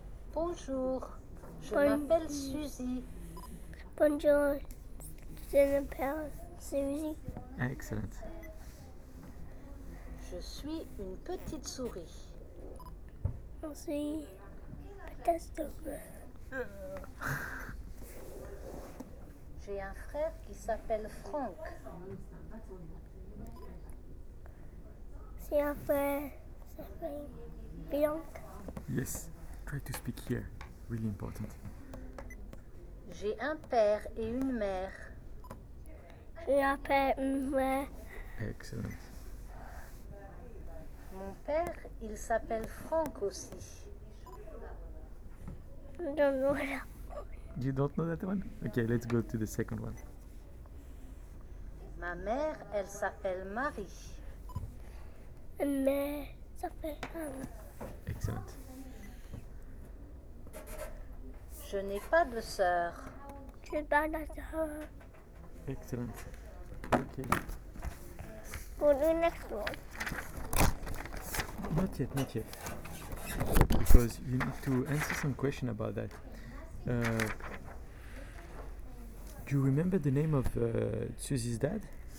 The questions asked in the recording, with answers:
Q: Do you remember the name of Susie's dad?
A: Oh, it's Frank.